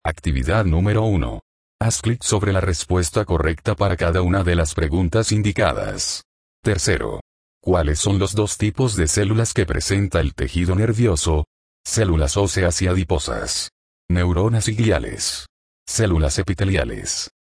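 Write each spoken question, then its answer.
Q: ¿Cuáles son los dos tipos de células que presenta el tejido nervioso?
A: Neuronas y gliales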